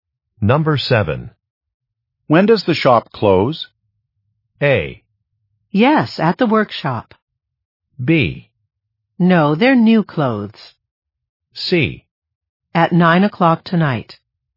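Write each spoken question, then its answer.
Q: When does the shop close?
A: C: At 9 o'clock tonight.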